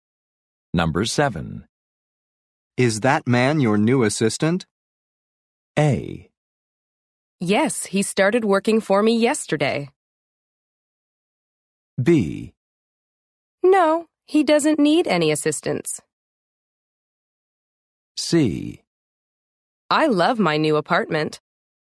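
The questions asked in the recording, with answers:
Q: Is that man your new assistant?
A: A: Yes, he started working for me yesterday.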